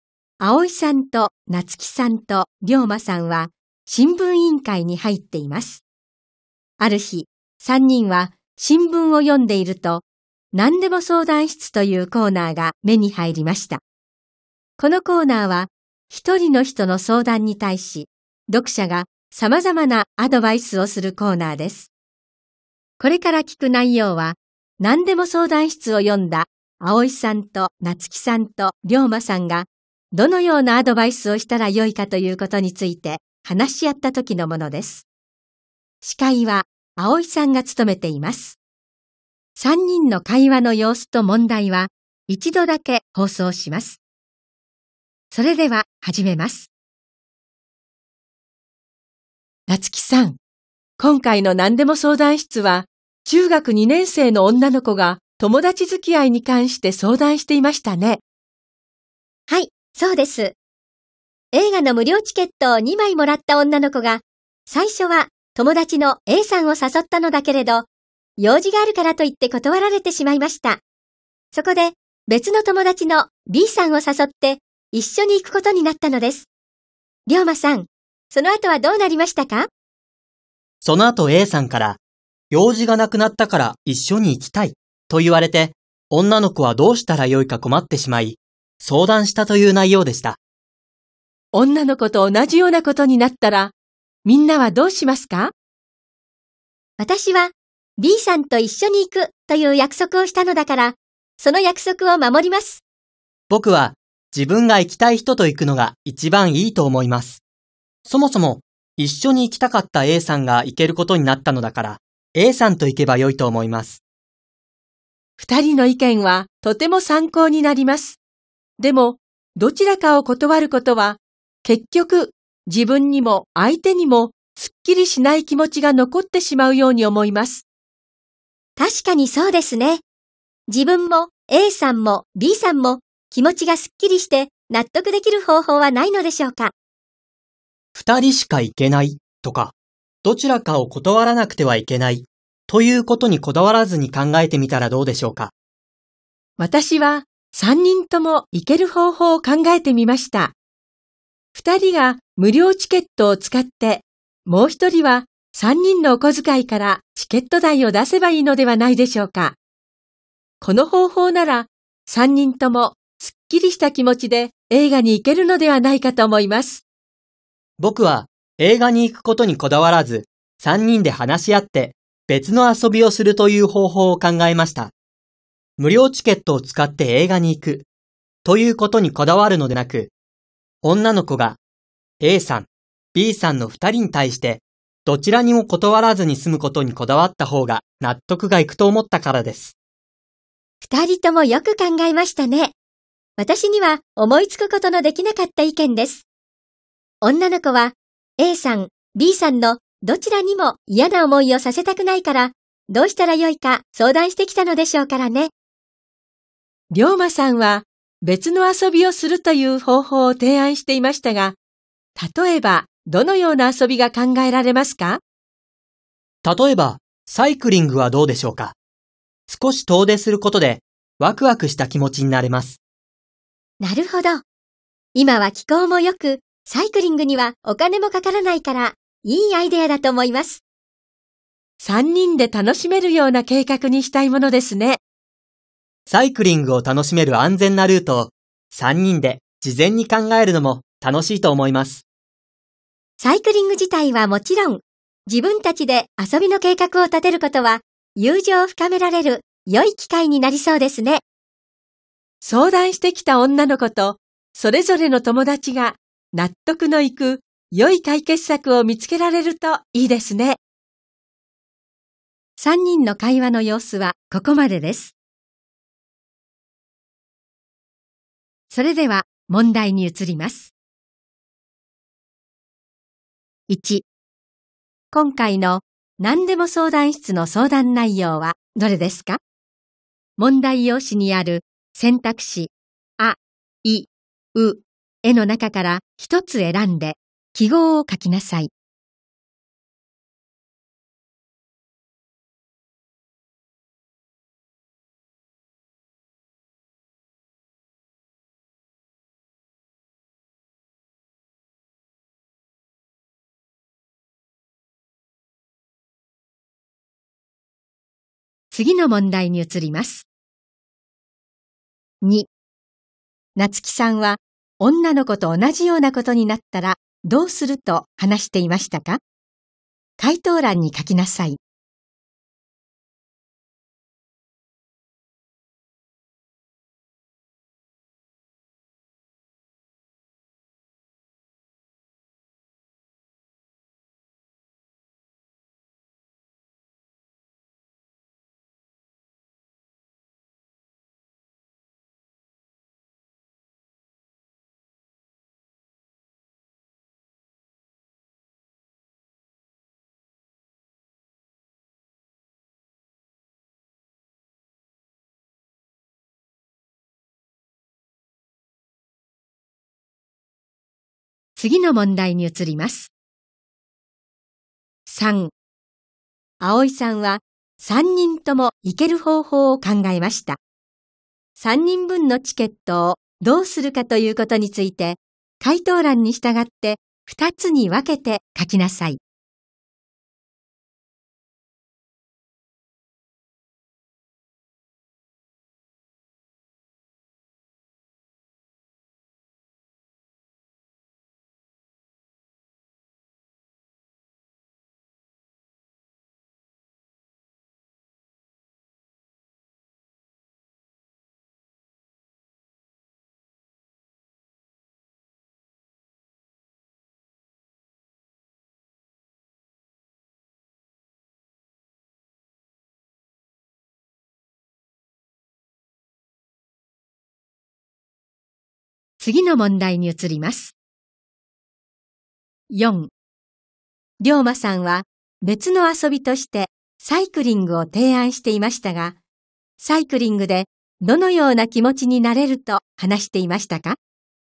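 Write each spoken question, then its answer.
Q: 夏希さんは女の子と同じようなことになったらどうすると話していましたか?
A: Bさんと一緒に行くという約束を守る

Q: 葵さんは3人とも行ける方法を考えました。3人分のチケットをどうするかということについて、回答欄に従って2つに分けて書きなさい。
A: 2人は無料チケットを使い、もう1人のチケット代は3人のお小遣いから出す

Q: 龍馬さんは別の遊びとしてサイクリングを提案していましたが、サイクリングでどのような気持ちになれると話していましたか?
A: 少し遠出することでワクワクした気持ち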